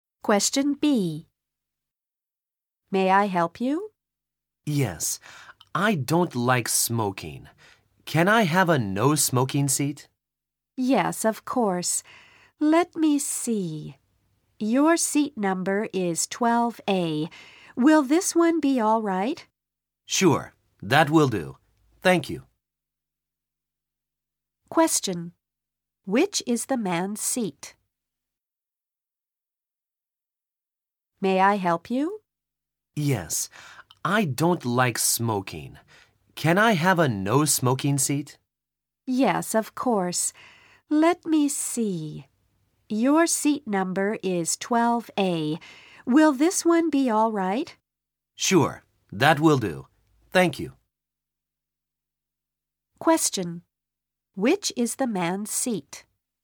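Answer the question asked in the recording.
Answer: 12A, a no-smoking seat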